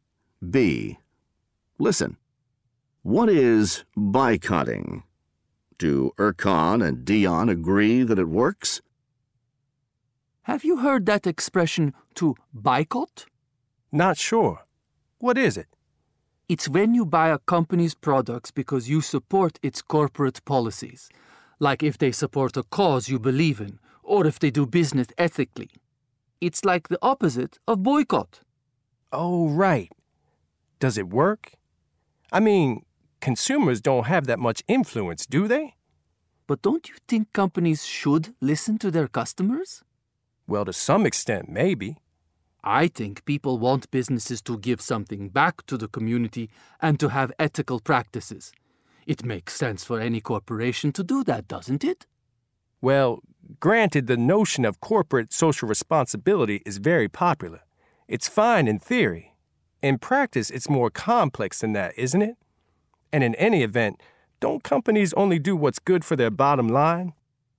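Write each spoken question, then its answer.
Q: Do Erkan and Dion agree that it works?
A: No, they don't agree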